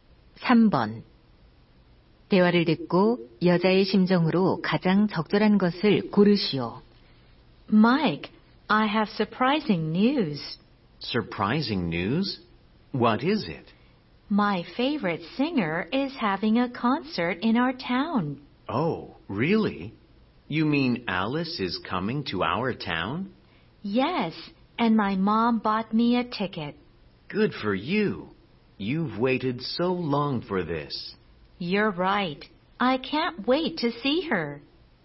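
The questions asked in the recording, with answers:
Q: 대화를 듣고 여자의 심정으로 가장 적절한 것을 고르시오.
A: 신남, 기대됨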